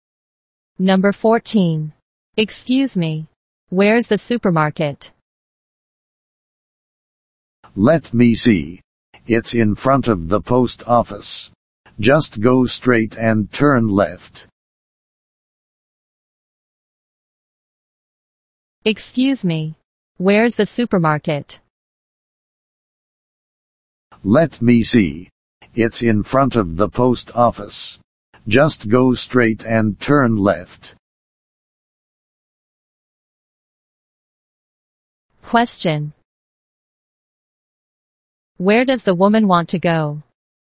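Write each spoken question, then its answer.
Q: Where does the woman want to go?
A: The supermarket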